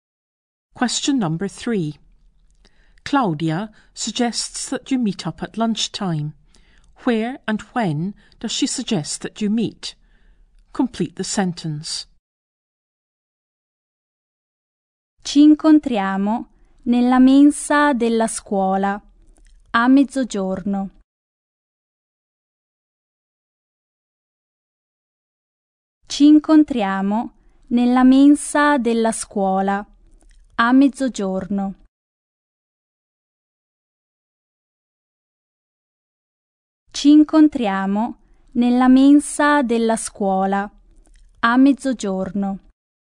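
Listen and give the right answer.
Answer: In the school canteen at midday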